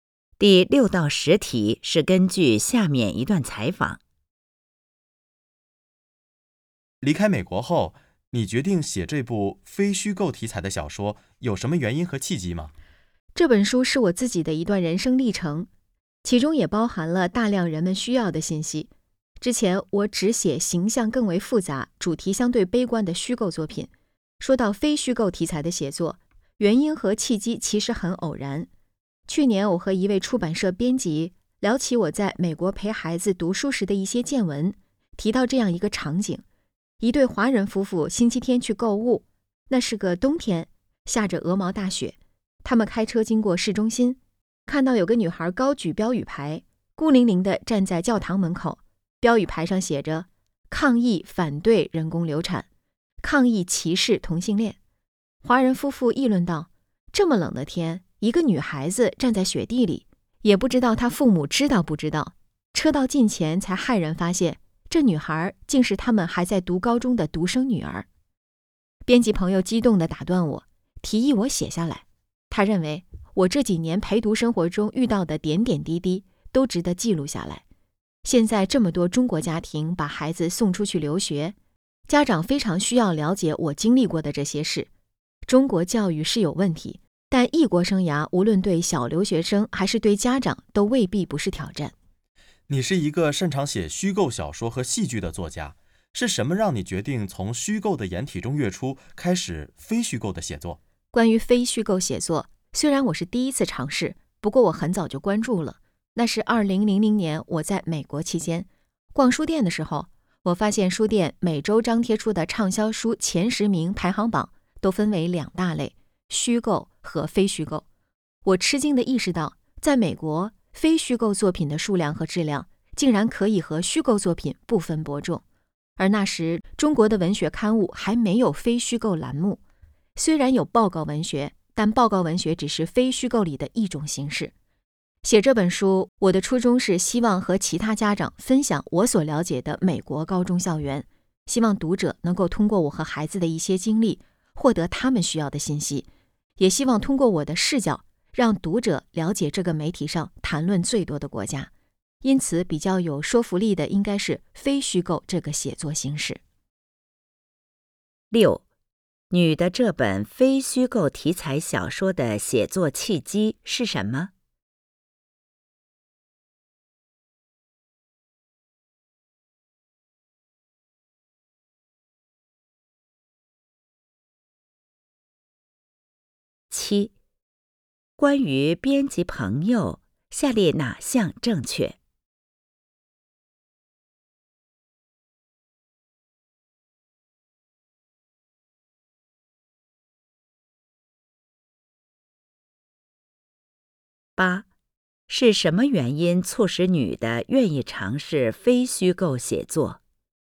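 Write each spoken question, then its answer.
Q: 你的这本非虚构题材小说的写作契机是什么?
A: 她和出版社编辑聊起在美国陪孩子读书时的见闻,编辑提议她写下来

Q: 是什么原因促使女的愿意尝试非虚构写作?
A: 她在美国发现畅销书榜分虚构和非虚构两类,非虚构作品的数量和质量可以和虚构作品不分伯仲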